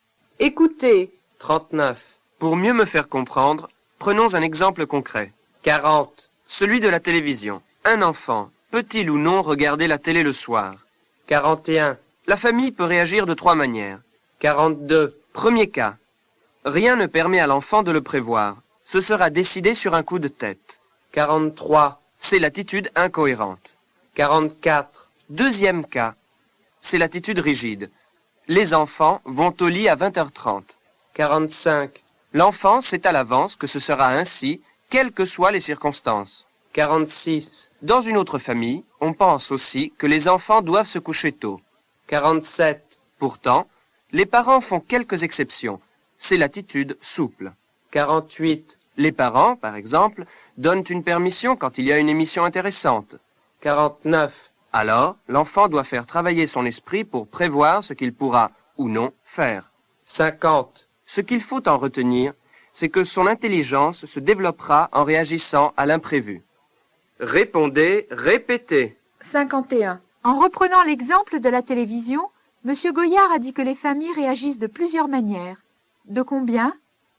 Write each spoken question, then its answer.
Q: En reprenant l'exemple de la télévision, M. Goyard a dit que les familles réagissent de plusieurs manières. De combien ?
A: Il a dit que la famille peut réagir de trois manières.